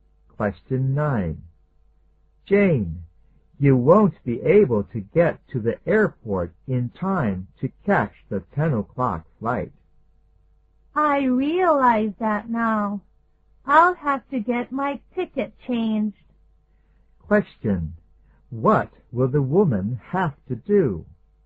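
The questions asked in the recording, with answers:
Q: What will the woman have to do?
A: Get her ticket changed (take a later flight).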